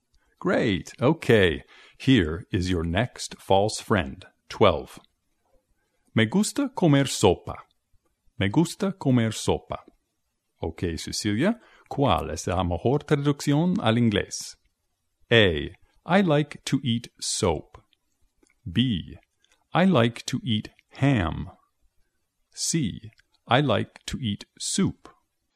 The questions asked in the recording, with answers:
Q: Ok, Cecilia, ¿cuál es la mejor traducción al inglés?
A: La respuesta es C. I like to eat soup.